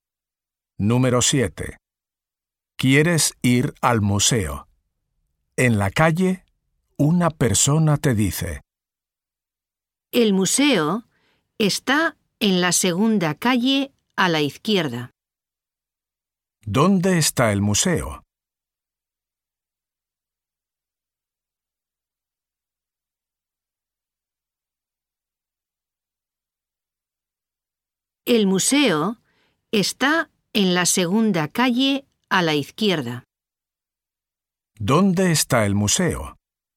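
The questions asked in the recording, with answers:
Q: ¿Dónde está el museo?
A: En la segunda calle a la izquierda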